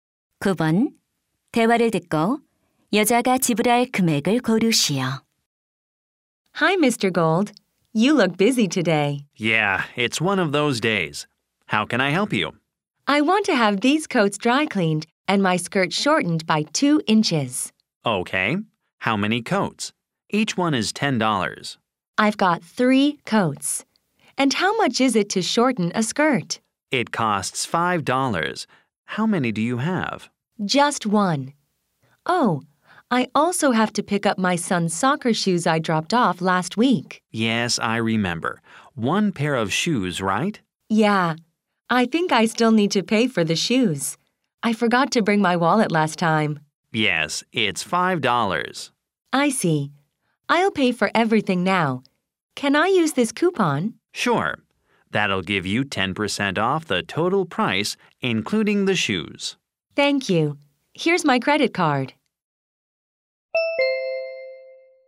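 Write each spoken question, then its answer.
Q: 대화를 듣고 여자가 지불할 금액을 고르시오.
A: 36달러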